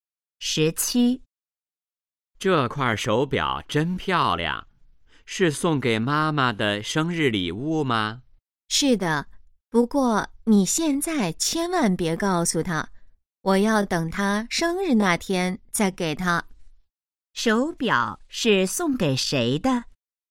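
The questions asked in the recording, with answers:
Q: 手表是送给谁的?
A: 妈妈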